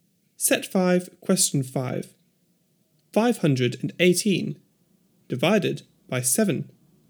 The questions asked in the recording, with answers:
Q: 518 divided by 7.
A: 74.